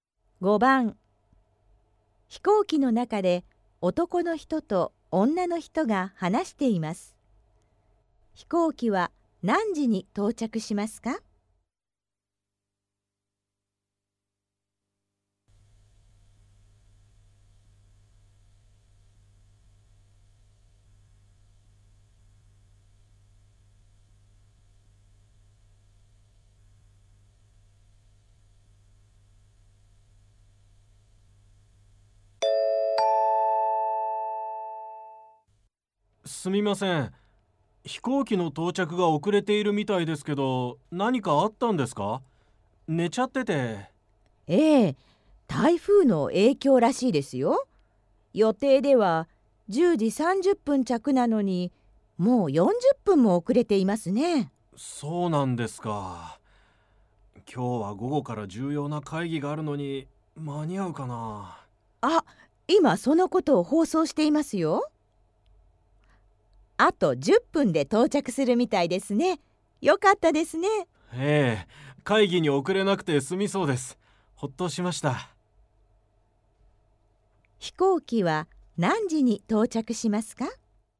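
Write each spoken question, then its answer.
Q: 飛行機は何時に到着しますか?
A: 11時20分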